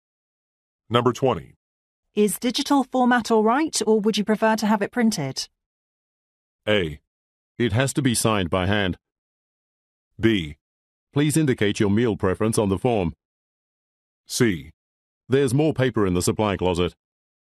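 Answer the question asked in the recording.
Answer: A: It has to be signed by hand.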